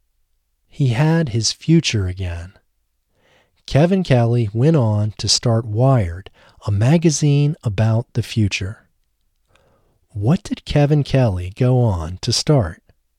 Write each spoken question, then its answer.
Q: What did Kevin Kelly go on to start?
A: Kevin Kelly went on to start Wired, a magazine about the future.